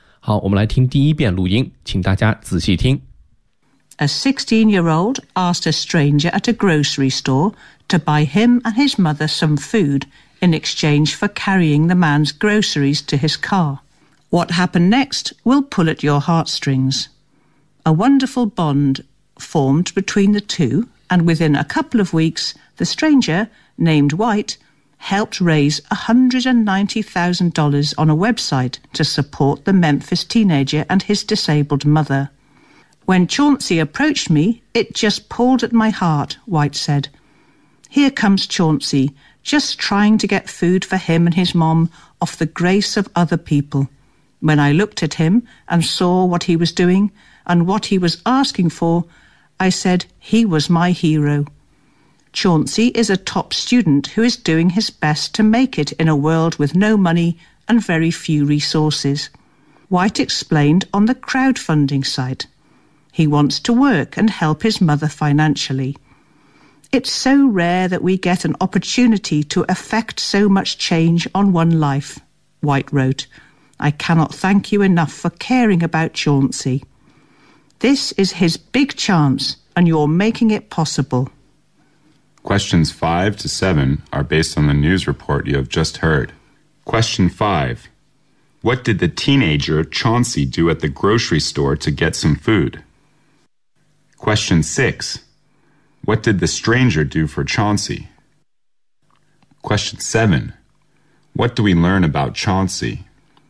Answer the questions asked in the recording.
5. He asked a stranger for help by sending the groceries of the stranger to his or her car, and then in exchange for some food.
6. Go to a crowdfunding website and raised $190,000 for Chauncey and his mother.
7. Chauncey is a 16-year-old boy from Memphis, and he is a top student in school.